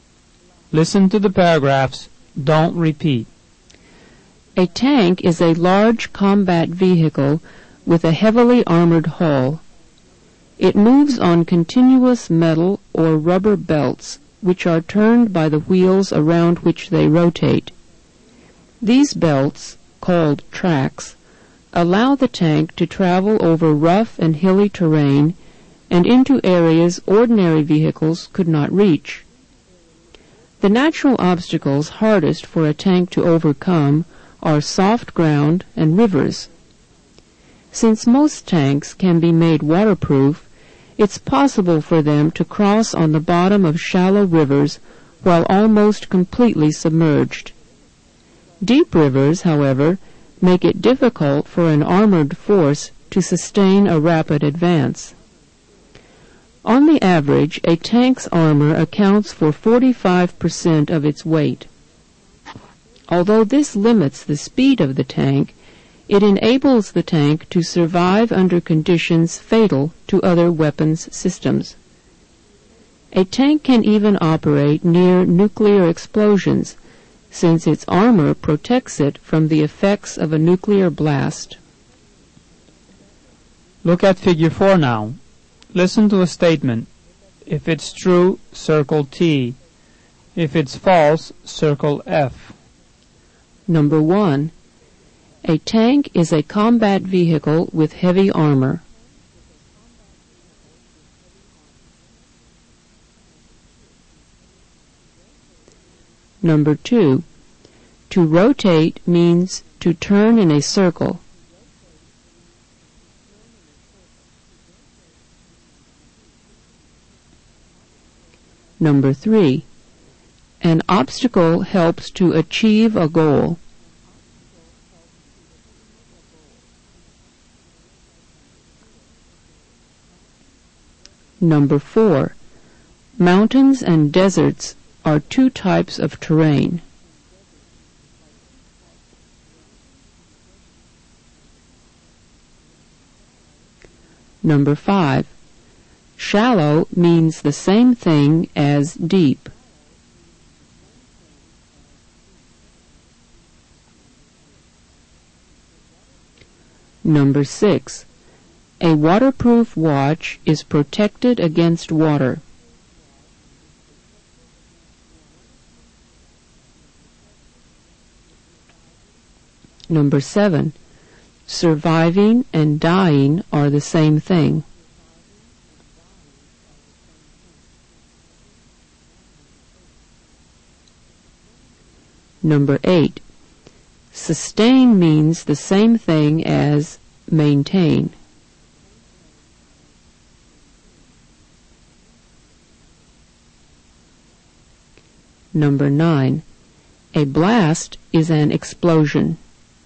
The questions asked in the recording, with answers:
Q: a tank is a combat vehicle with heavy armor.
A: Number 1 is true.

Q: to rotate means to turn in a circle.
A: Number 2 is true.

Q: An obstacle helps to achieve a goal.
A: Number 3 is false. An obstacle doesn't help you to achieve a goal.

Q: Mountains and deserts are two types of terrain.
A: Number 4 is true.

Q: Shallow means the same thing as deep.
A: Number 5 is false. Shallow isn't the same as deep.

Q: A waterproof watch is protected against water.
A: Number 6 is true.

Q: Surviving and dying are the same thing.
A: Number 7 is false. Surviving isn't the same as dying.

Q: Sustain means the same thing as maintain.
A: Number 8 is true.

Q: A blast is an explosion.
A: Number 9 is true.